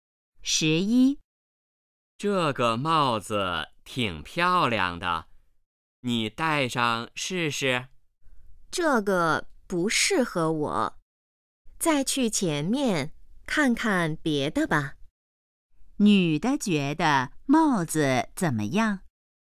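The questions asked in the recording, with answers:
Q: 女的觉得帽子怎么样?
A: 不适合自己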